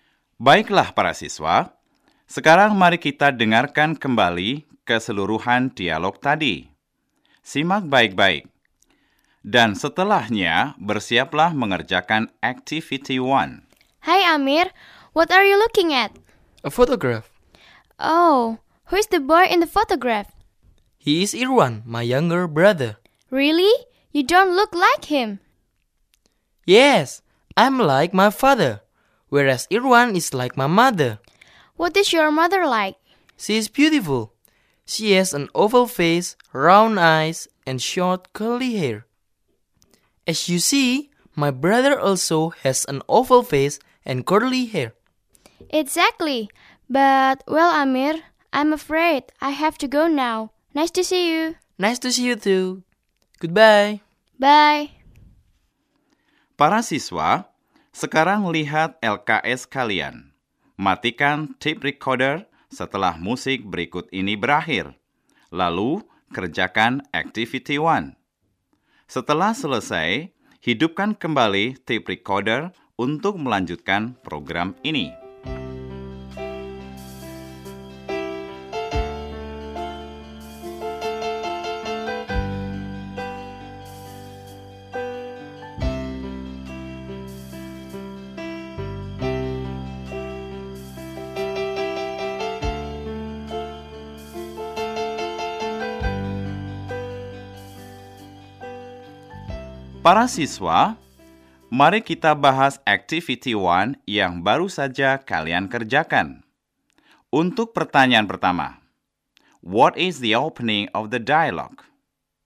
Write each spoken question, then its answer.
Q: what is the opening of the dialogue?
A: Hi, Amir. Ya, benar. The opening of the dialogue is, hi, Amir.